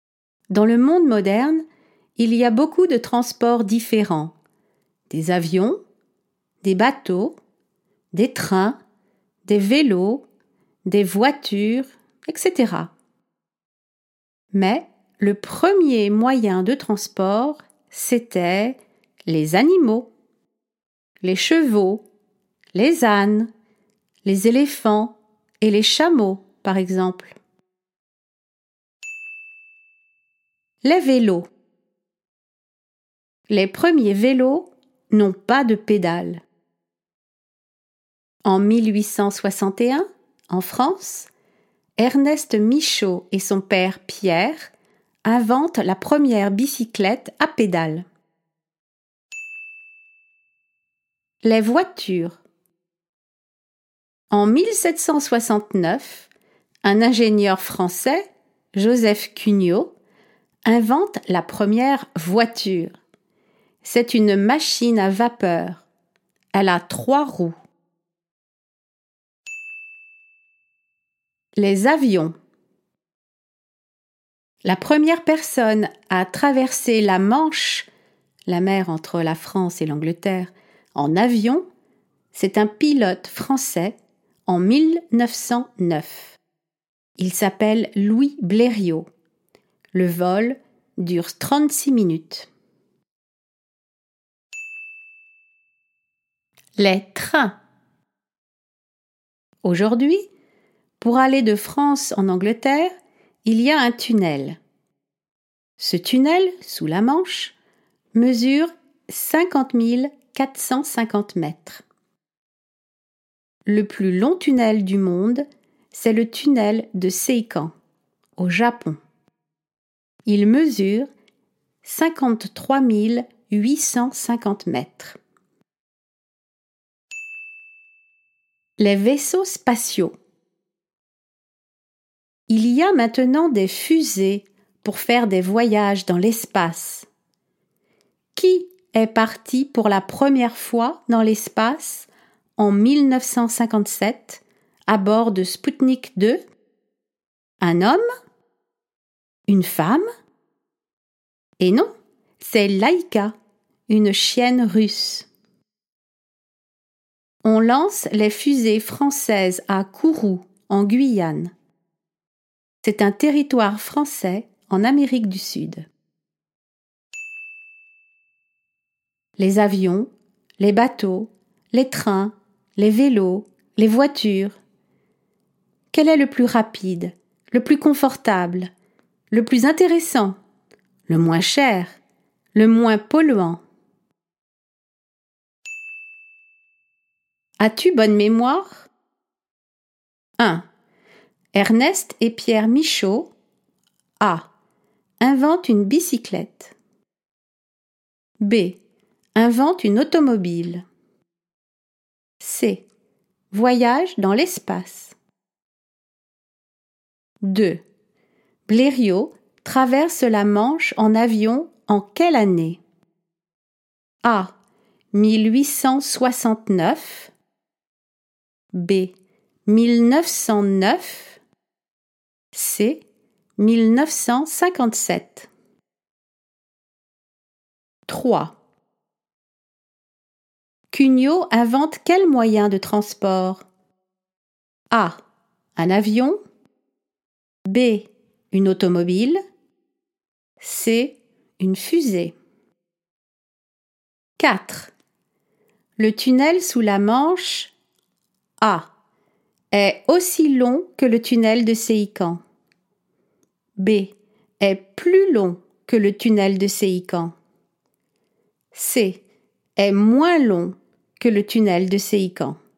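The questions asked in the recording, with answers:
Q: Ernest et Pierre Michaud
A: A: Inventent une bicyclette.

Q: Blériot traverse la Manche en avion en quelle année?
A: B: 1909

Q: Cugnot invente quel moyen de transport?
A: B: Une automobile.

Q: Le tunnel sous la Manche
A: C: Est moins long que le tunnel de Seikan.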